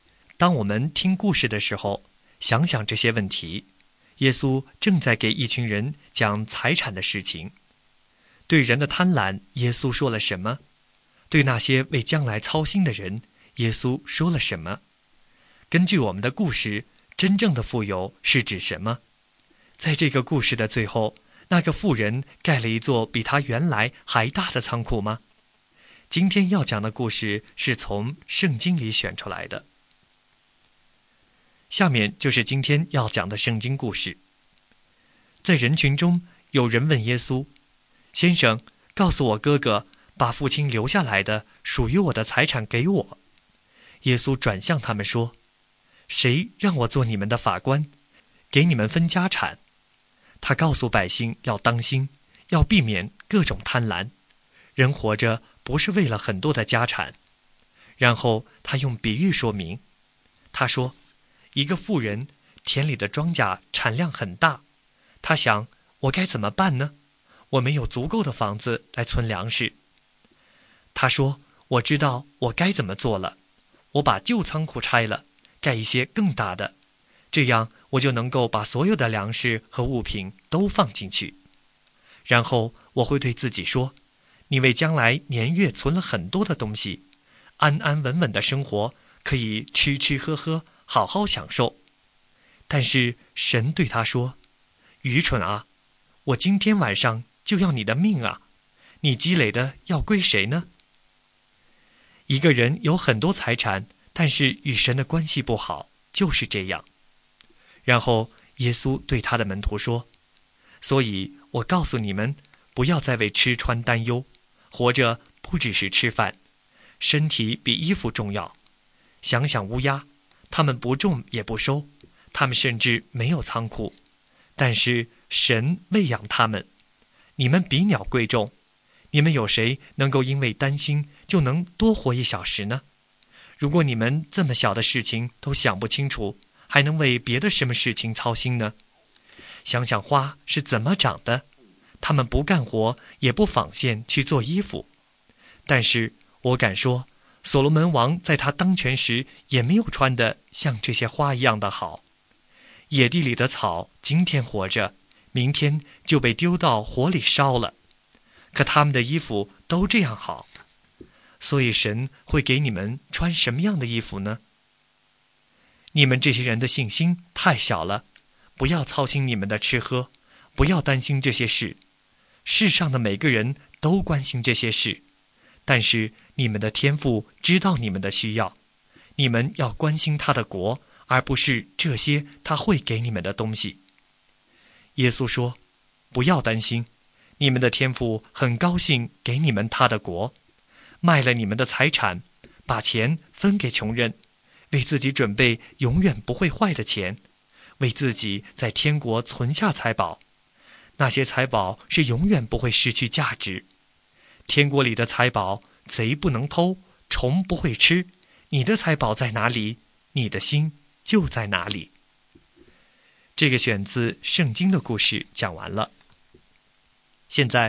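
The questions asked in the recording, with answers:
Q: 对人的贪婪,耶稣说了什么?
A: 要当心,避免各种贪婪;人活着不是为了很多的家产

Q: 对那些为将来操心的人,耶稣说了什么?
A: 不要为吃穿担忧,天父知道你们的需要,要先关心神的国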